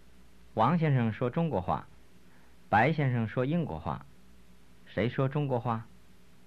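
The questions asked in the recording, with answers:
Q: 谁说中国话?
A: 王先生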